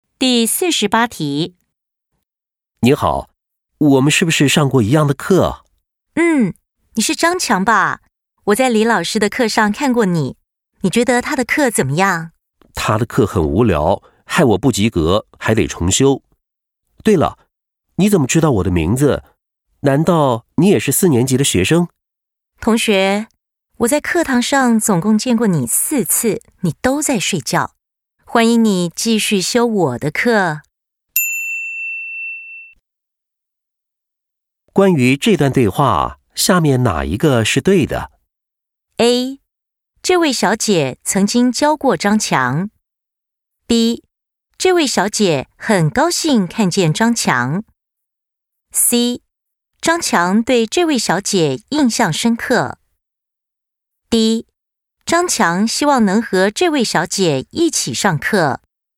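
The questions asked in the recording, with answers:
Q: 关于这段对话,下面哪一个是对的?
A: A: 这位小姐曾经教过张强。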